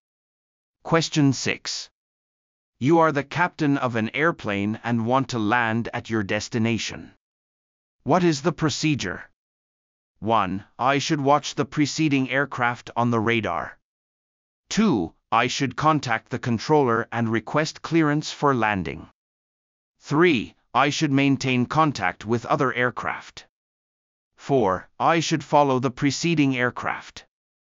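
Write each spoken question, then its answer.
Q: What is the procedure?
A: 2: I should contact the controller and request clearance for landing.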